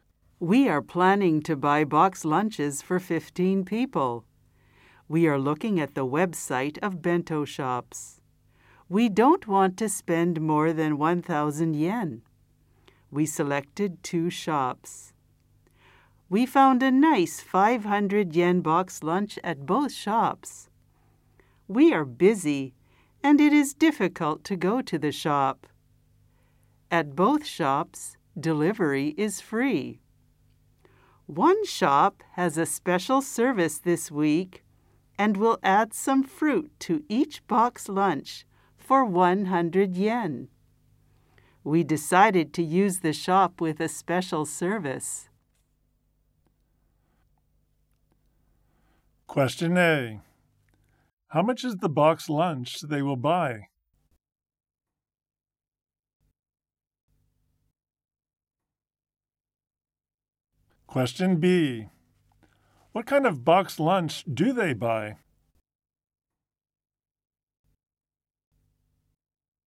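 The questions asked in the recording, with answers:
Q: How much is the box lunch they will buy?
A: 600 yen

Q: What kind of box lunch do they buy?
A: A 500 yen box lunch with fruit added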